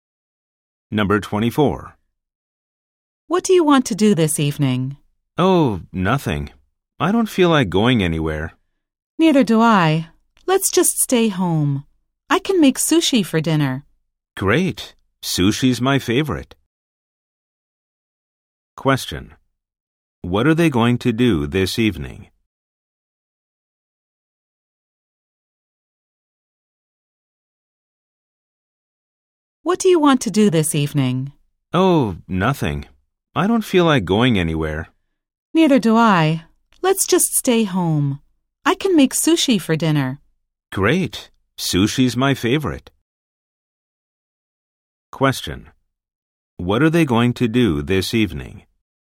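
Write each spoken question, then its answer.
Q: What are they going to do this evening?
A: Stay home and have sushi for dinner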